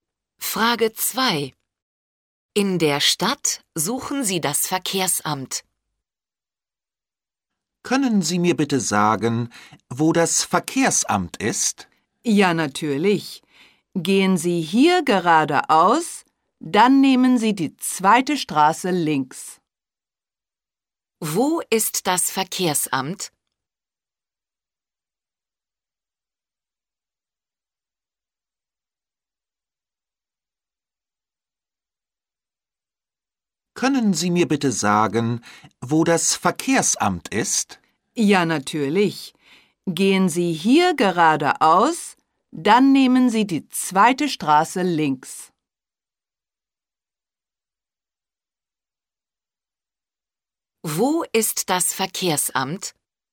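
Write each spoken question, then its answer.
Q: Wo ist das Verkehrsamt?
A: Geradeaus, dann die zweite Straße links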